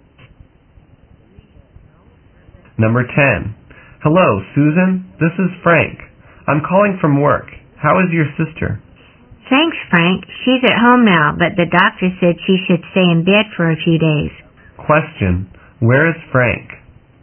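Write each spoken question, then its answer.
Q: Where is Frank?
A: At work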